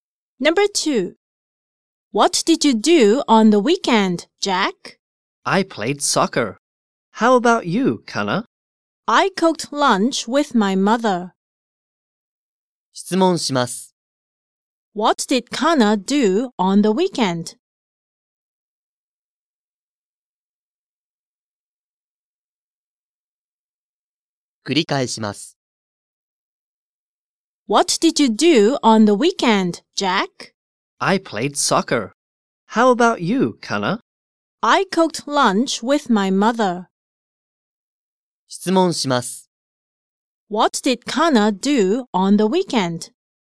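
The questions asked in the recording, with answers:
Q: What did Kana do on the weekend?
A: She cooked lunch with her mother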